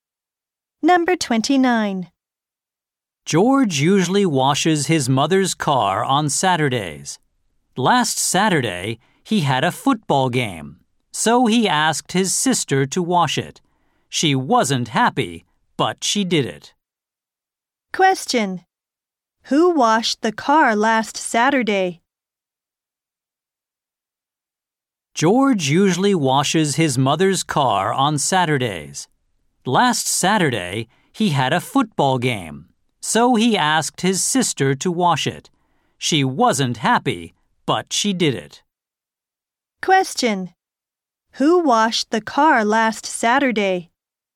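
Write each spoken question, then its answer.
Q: Who washed the car last Saturday?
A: George's sister.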